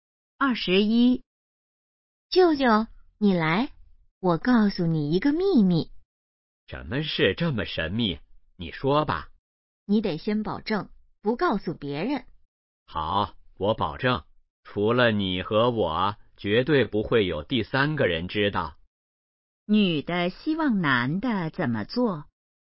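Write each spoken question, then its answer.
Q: 女的希望男的怎么做?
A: 保守秘密,不告诉别人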